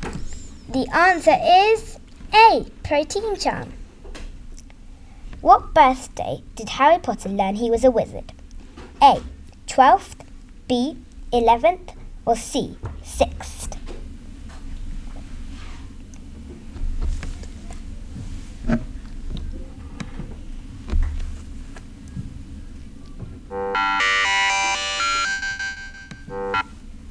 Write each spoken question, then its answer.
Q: What birthday did Harry Potter learn he was a wizard?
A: The answer is B. 11th.